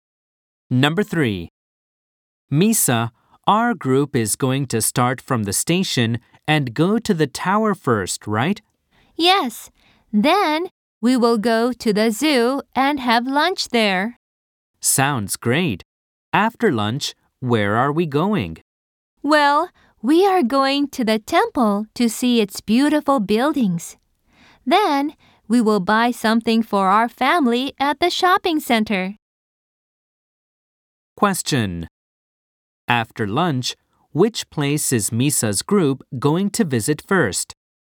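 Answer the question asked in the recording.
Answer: The temple.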